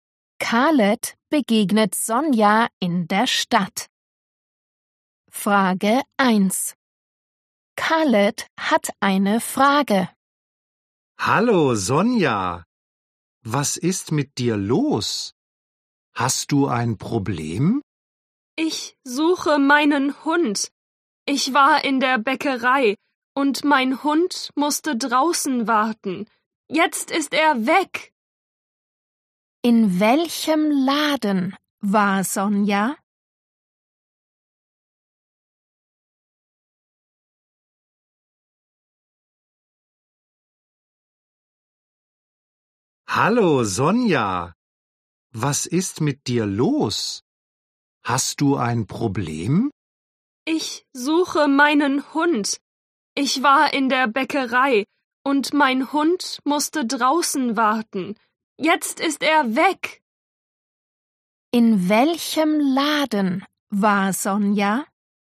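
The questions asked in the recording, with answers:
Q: In welchem Laden war Sonja?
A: in der Bäckerei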